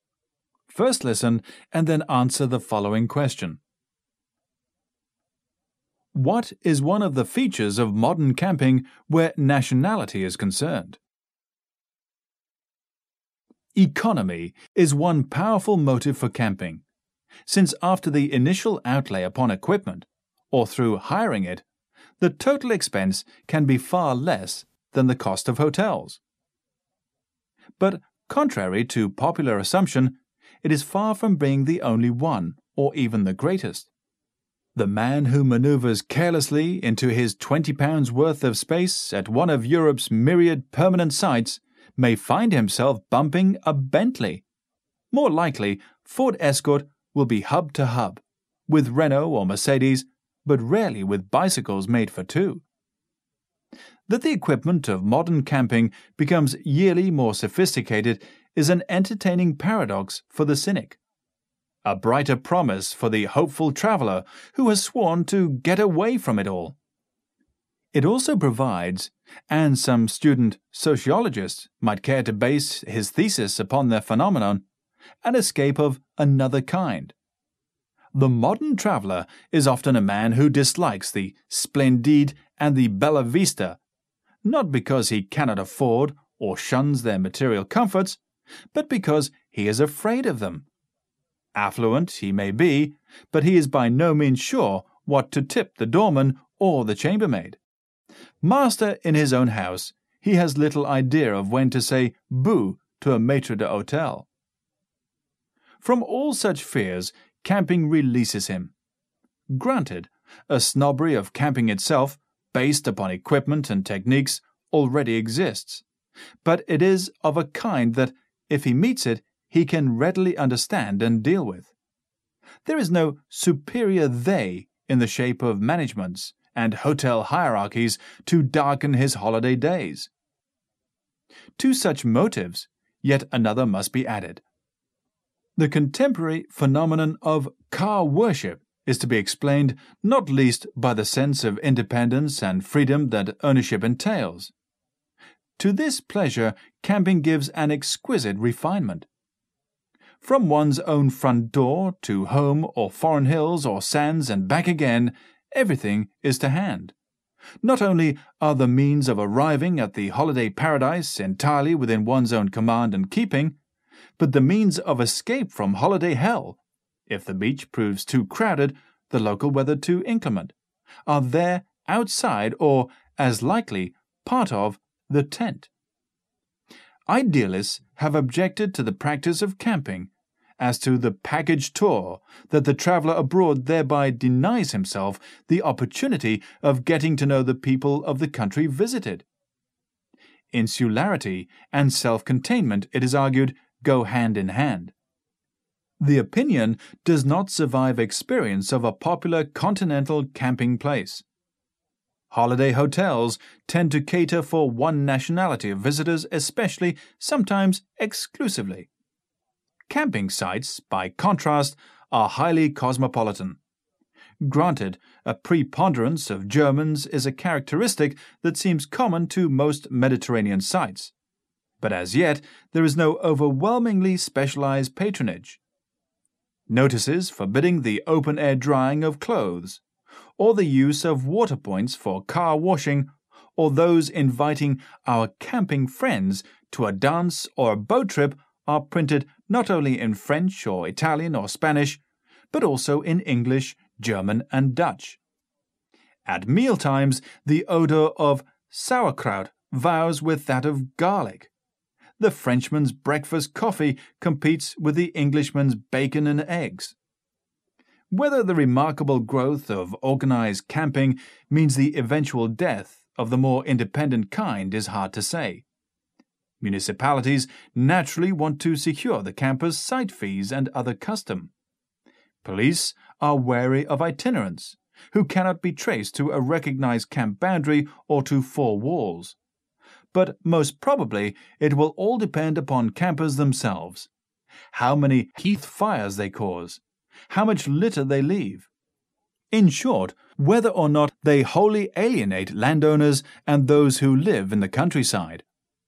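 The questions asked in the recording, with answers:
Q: What is one of the features of modern camping where nationality is concerned?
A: Camping sites are highly cosmopolitan, with many nationalities mixing together.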